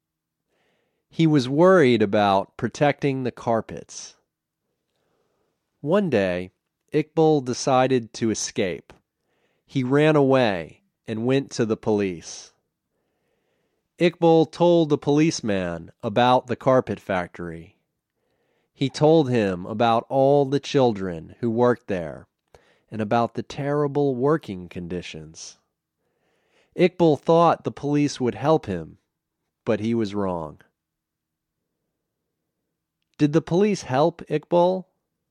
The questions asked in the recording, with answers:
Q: Did the police help Iqbal?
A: No, the police didn't help Iqbal.